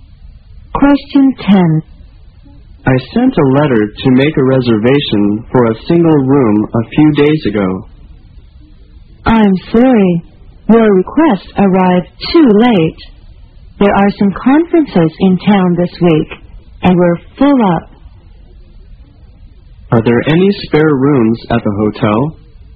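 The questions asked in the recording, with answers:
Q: Are there any spare rooms at the hotel?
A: No, the hotel is full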